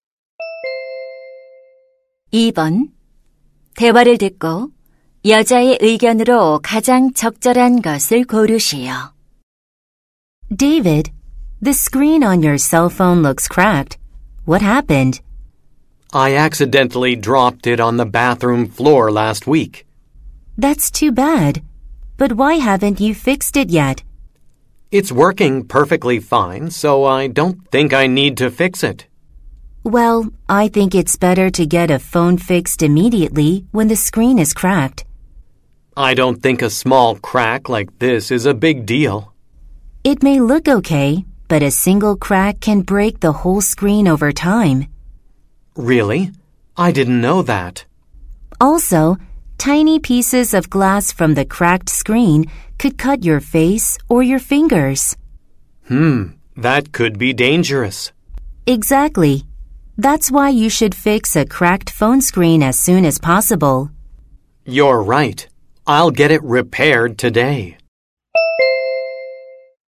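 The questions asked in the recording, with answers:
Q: 대화를 듣고 여자의 의견으로 가장 적절한 것을 고르시오.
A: 금이 간 휴대폰 화면은 즉시 수리하는 것이 좋다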